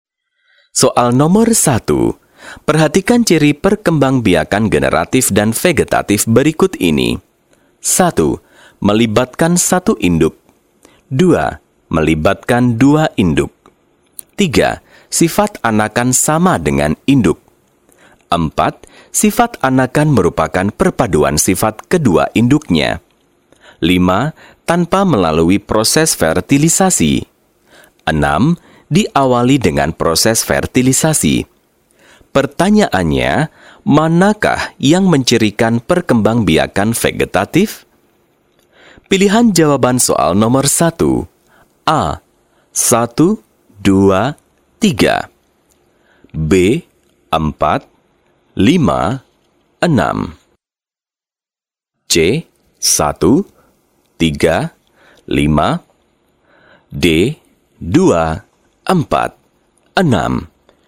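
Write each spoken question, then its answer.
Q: Pertanyaannya, manakah yang mencirikan perkembangbiakan vegetatif?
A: C: 1, 3, 5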